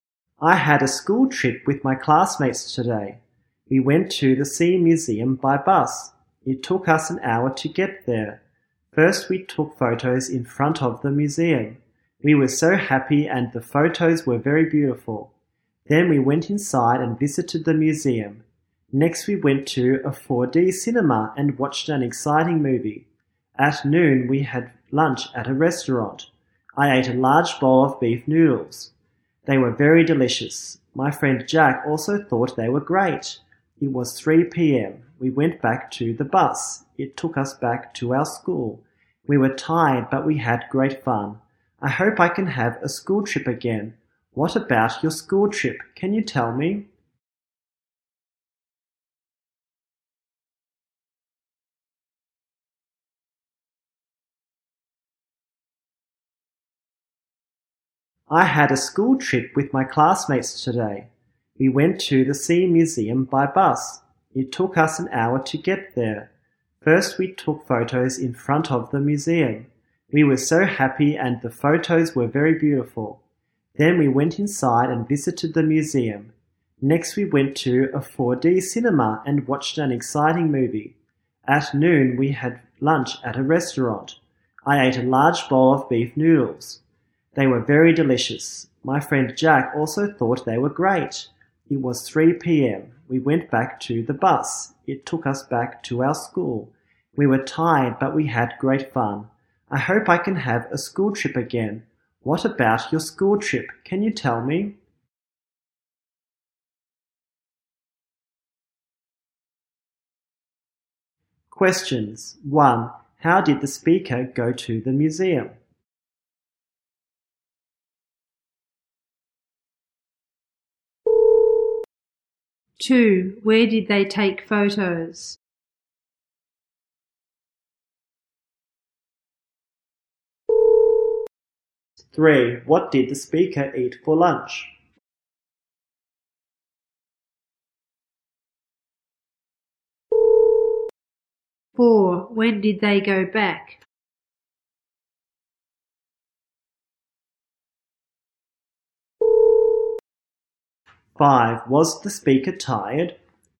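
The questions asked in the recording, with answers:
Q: How did the speaker go to the museum?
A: By bus

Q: Where did they take photos?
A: In front of the museum

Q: What did the speaker eat for lunch?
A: A large bowl of beef noodles

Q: When did they go back?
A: At 3 p.m.

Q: Was the speaker tired?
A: Yes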